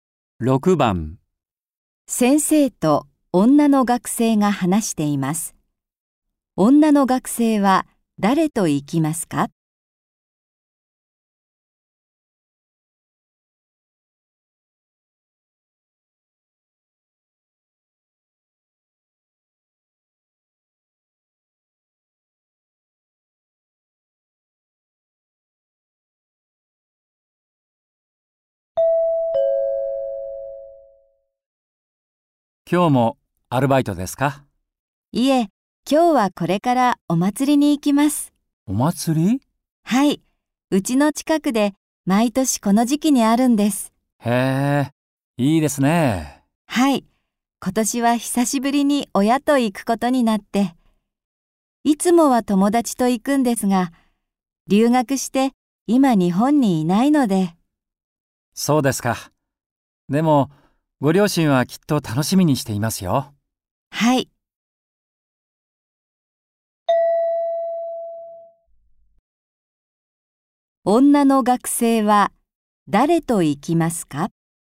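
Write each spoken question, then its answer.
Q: 女の学生は誰と行きますか?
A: 親(両親)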